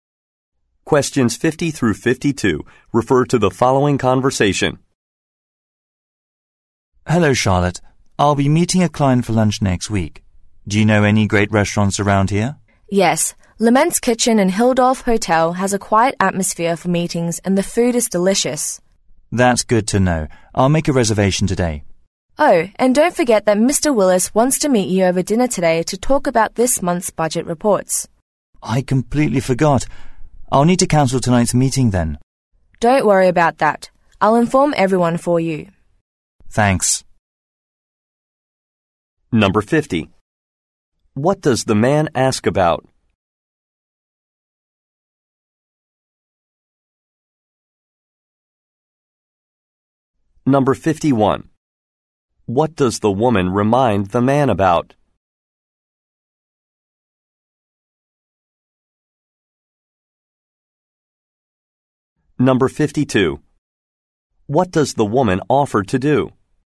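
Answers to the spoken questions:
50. Restaurant recommendations
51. A dinner meeting with Mr. Willis today
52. Inform everyone about the cancellation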